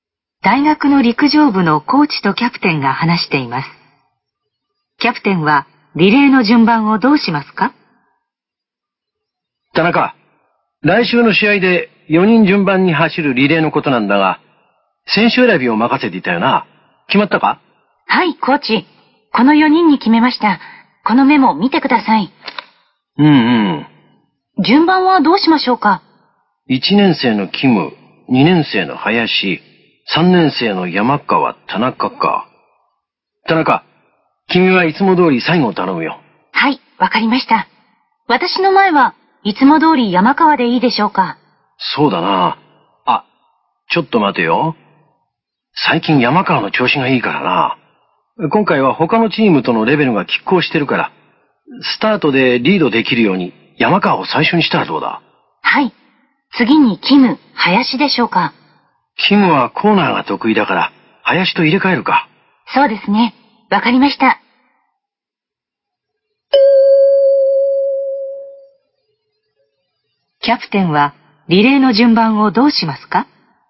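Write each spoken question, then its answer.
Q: キャプテンはリレーの順番をどうしますか?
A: 山川、林、キム、田中の順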